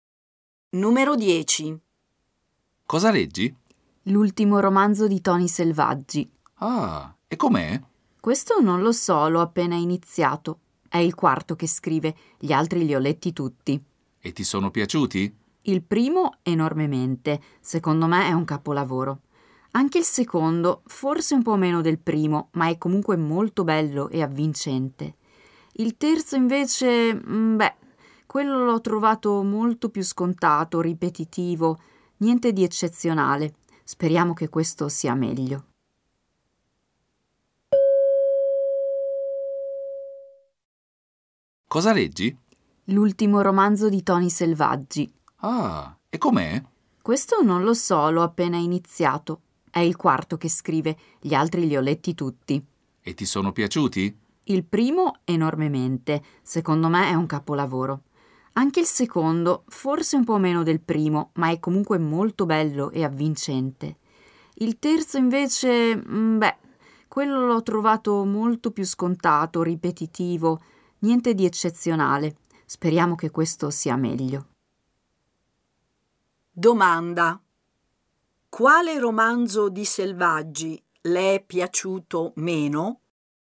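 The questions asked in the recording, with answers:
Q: Domanda. Quale romanzo di Selvaggi le è piaciuto meno?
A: Il terzo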